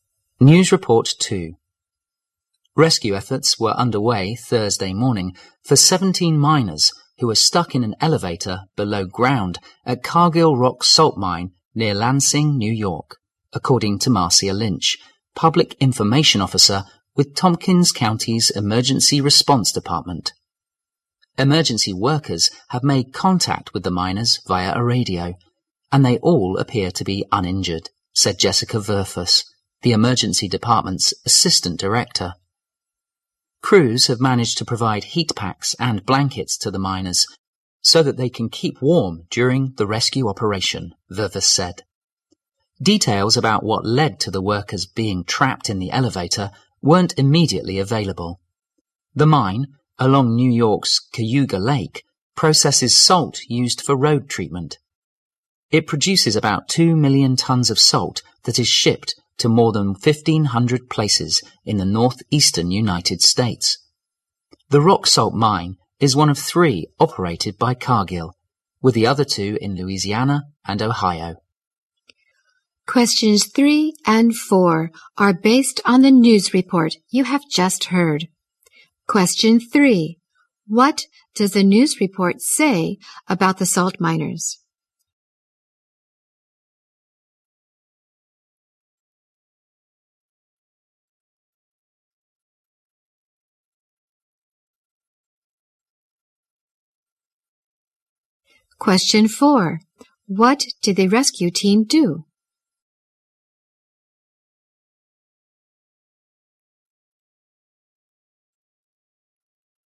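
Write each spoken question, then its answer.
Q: What does the news report say about the salt miners?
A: 17 miners were stuck in an elevator below ground, uninjured

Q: What did the rescue team do?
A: Provided heat packs and blankets to keep the miners warm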